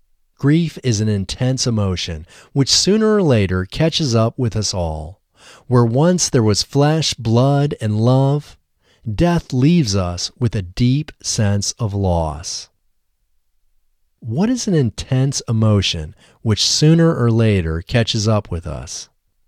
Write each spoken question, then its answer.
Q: What is an intense emotion, which sooner or later catches up with us?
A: Grief is an intense emotion which sooner or later catches up with us.